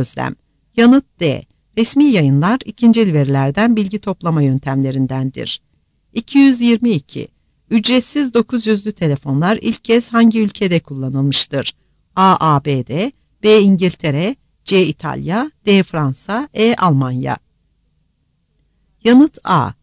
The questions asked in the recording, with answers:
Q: Ücretsiz 900'lü telefonlar ilk kez hangi ülkede kullanılmıştır?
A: Yanıt A.